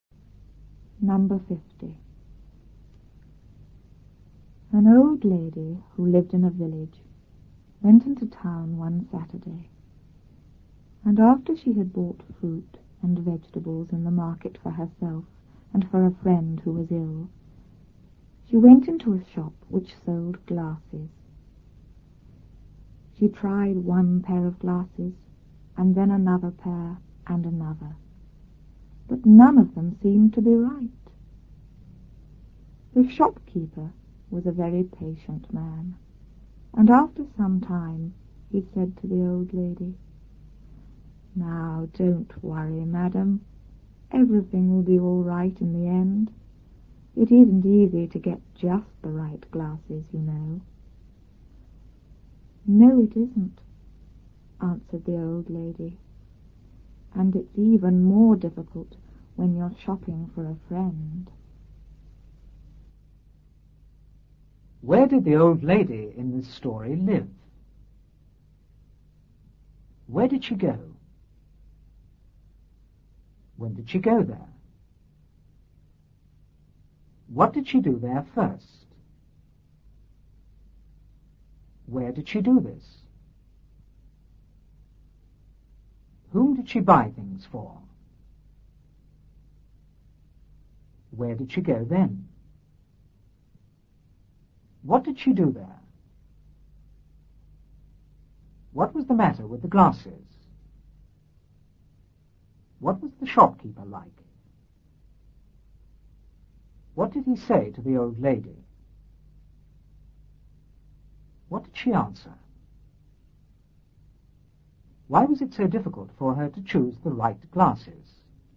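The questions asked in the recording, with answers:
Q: Where did the old lady in this story live?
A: In a village

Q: Where did she go?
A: Into town

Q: When did she go there?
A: One Saturday

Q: What did she do there first?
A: She bought fruit and vegetables

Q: Where did she do this?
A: In the market

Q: Whom did she buy things for?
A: For herself and for a friend who was ill

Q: Where did she go then?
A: Into a shop which sold glasses

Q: What did she do there?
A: She tried on pairs of glasses

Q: What was the matter with the glasses?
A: None of them seemed to be right

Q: What was the shopkeeper like?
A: Very patient

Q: What did he say to the old lady?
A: Don't worry, everything will be all right in the end; it isn't easy to get just the right glasses

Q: What did she answer?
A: No, it isn't, and it's even more difficult when you're shopping for a friend

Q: Why was it so difficult for her to choose the right glasses?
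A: She was shopping for a friend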